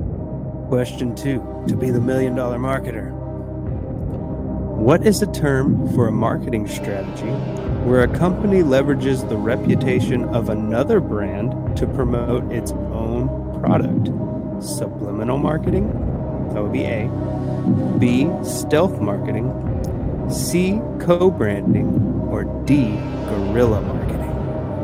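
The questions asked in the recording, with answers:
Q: What is a term for a marketing strategy where a company leverages the reputation of another brand to promote its own product?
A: C: co-branding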